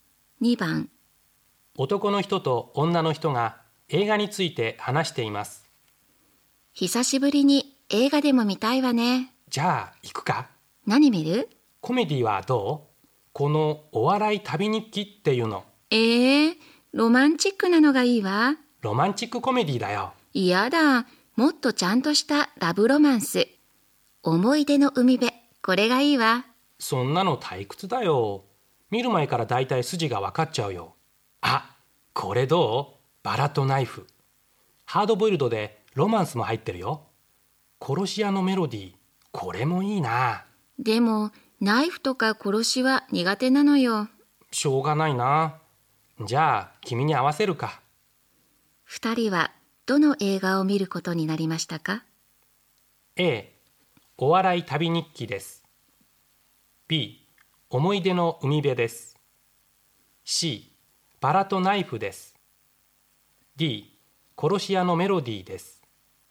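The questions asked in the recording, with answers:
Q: 二人はどの映画を見ることになりましたか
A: B: 思い出の海辺です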